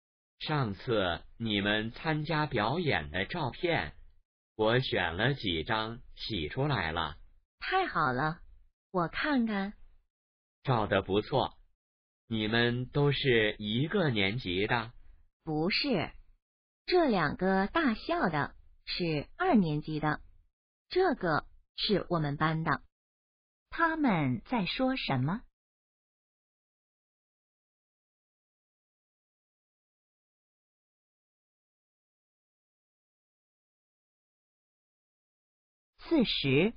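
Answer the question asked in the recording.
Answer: 参加表演时拍的照片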